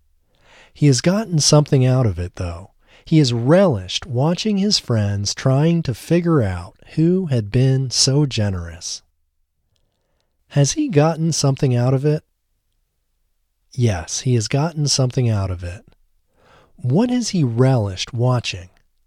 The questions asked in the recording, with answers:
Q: What has he relished watching?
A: He has relished watching his friends trying to figure out who had been so generous.